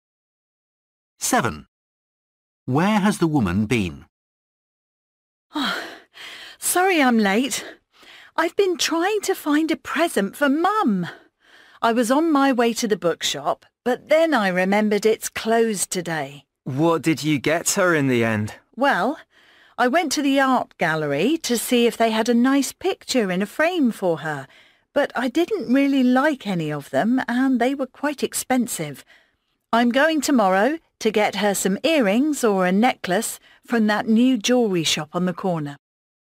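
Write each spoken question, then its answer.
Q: Where has the woman been?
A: to the art gallery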